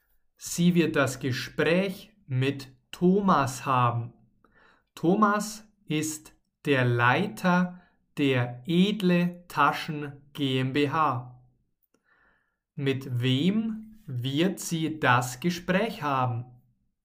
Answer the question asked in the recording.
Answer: Mit Thomas. Sie wird das Gespräch mit Thomas haben.